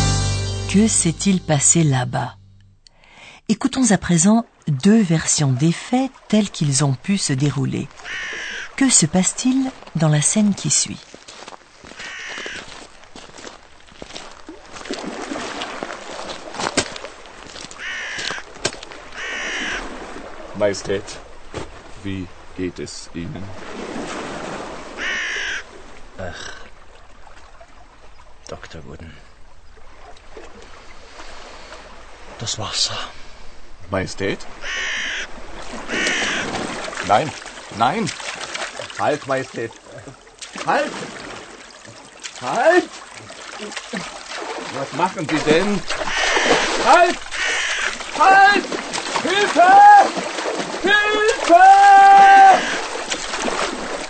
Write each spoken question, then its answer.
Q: Que se passe-t-il dans la scène qui suit ?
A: Mélancolique, le roi entre dans l'eau, et son médecin ne peut l'en empêcher.